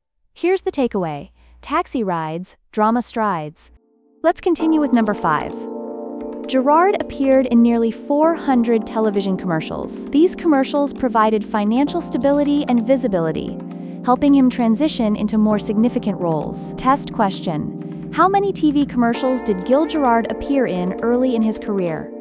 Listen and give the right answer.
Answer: nearly 400.